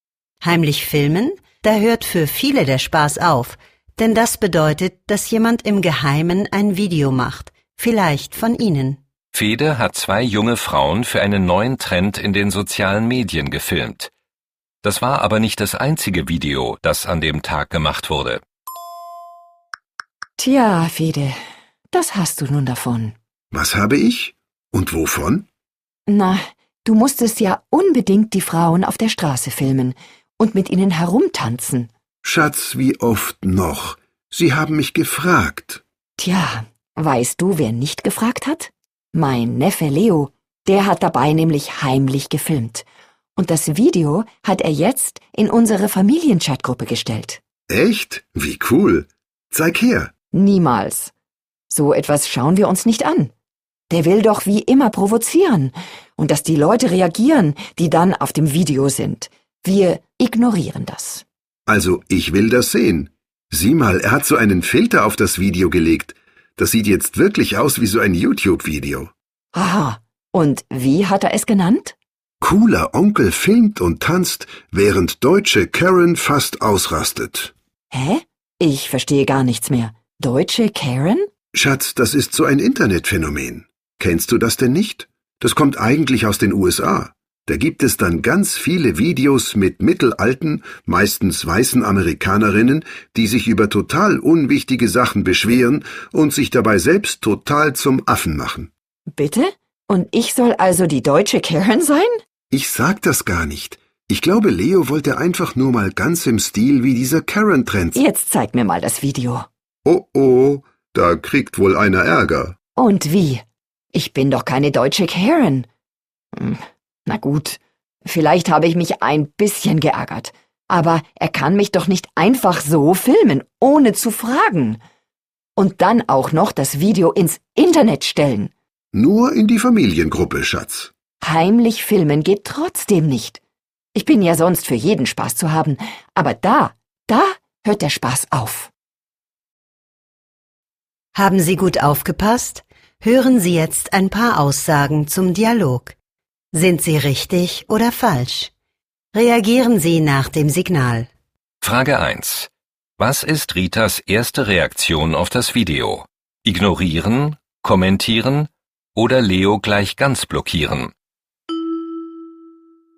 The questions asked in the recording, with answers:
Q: Was ist Ritas erste Reaktion auf das Video?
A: Rita möchte das ignorieren.